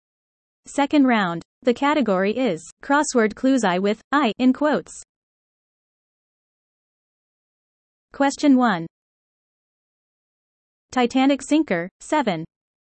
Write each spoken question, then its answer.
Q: Titanic sinker, 7.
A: The answer? Iceberg.